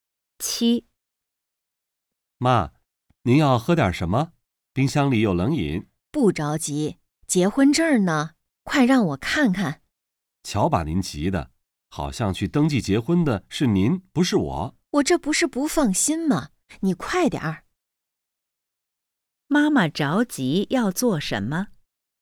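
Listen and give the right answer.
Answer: 看结婚证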